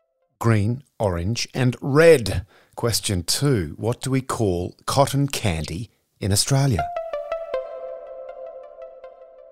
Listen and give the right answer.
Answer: Fairy floss.